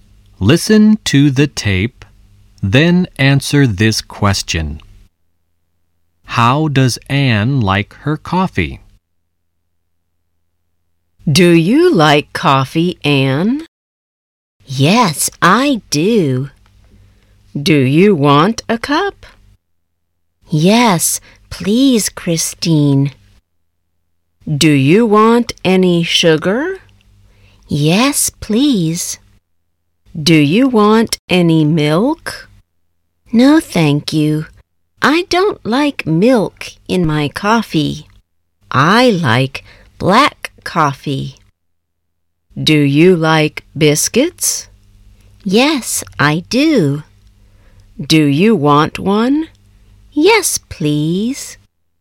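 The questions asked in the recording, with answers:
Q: How does Anne like her coffee?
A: Black, with sugar and no milk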